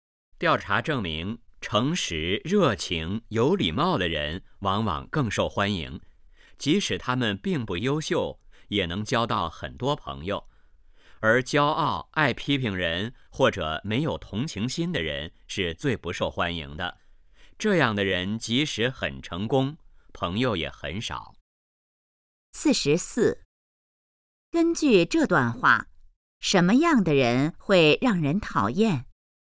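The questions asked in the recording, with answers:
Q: 根据这段话,什么样的人会让人讨厌?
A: 骄傲、爱批评人或者没有同情心的人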